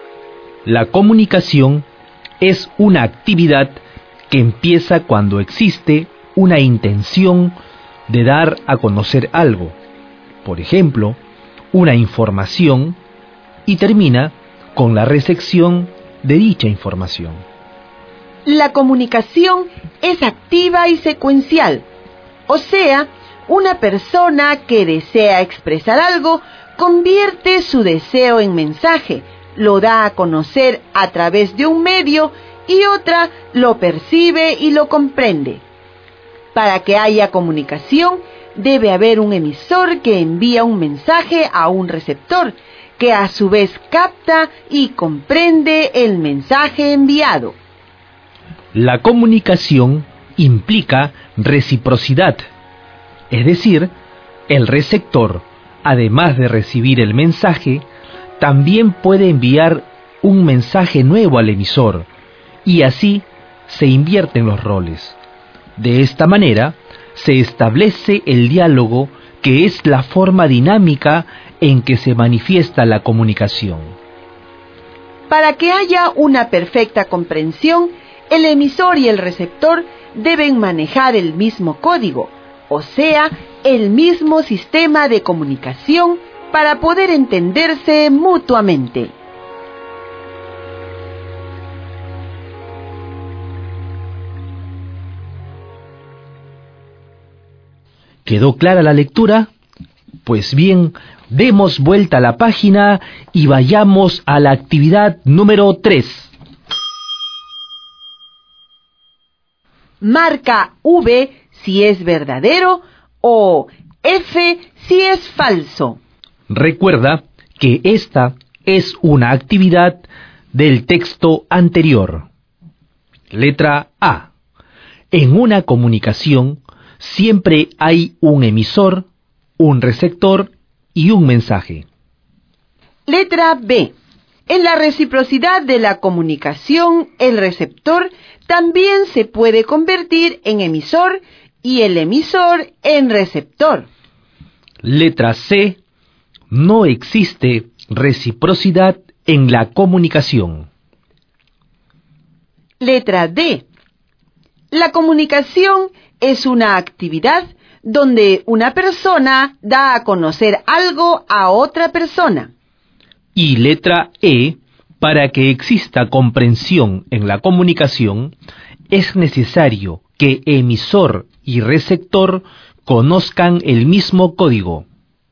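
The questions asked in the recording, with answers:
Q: En una comunicación siempre hay un emisor, un receptor y un mensaje.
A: Verdadero

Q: En la reciprocidad de la comunicación, el receptor también se puede convertir en emisor y el emisor en receptor.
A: Verdadero

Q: No existe reciprocidad en la comunicación.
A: Falso

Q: La comunicación es una actividad donde una persona da a conocer algo a otra persona.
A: Verdadero

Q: Para que exista comprensión en la comunicación, es necesario que emisor y receptor conozcan el mismo código.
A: Verdadero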